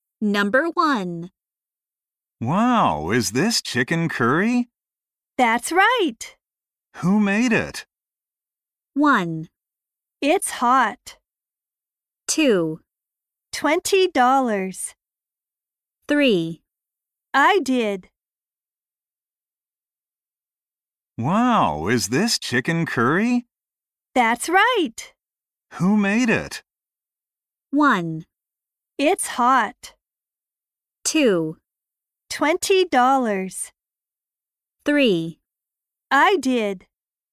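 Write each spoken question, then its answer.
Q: Who made it?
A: 3: I did.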